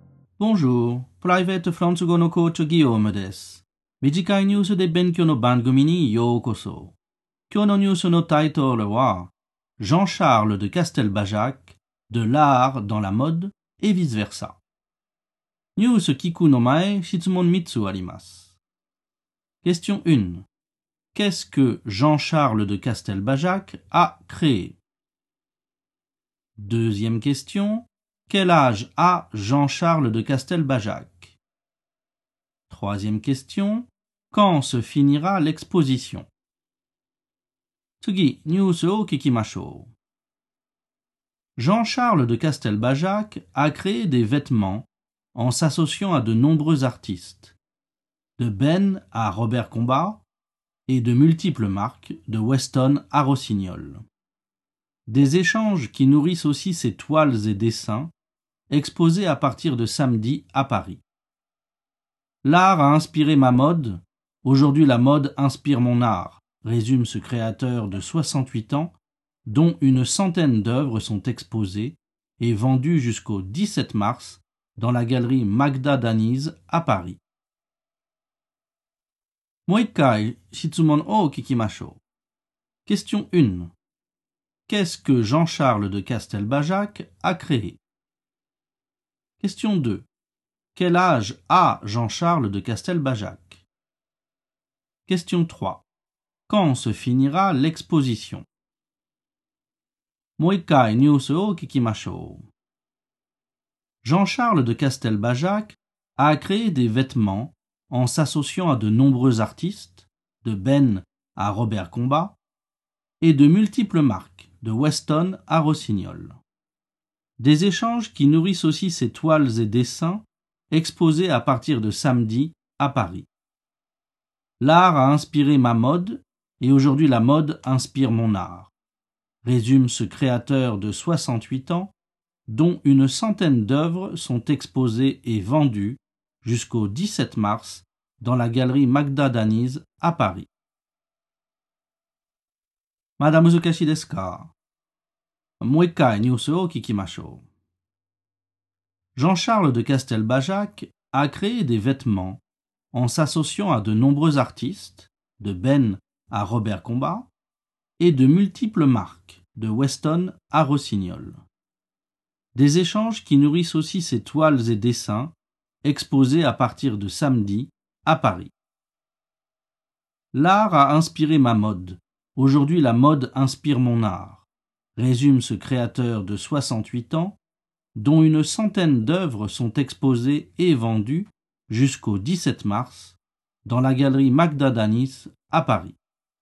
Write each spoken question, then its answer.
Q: Qu'est-ce que Jean-Charles de Castelbajac a créé?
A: Il a créé des vêtements, des toiles et des dessins.

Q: Quel âge a Jean-Charles de Castelbajac?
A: Il a 68 ans.

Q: Quand se finira l'exposition?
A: L'exposition se finira le 17 mars.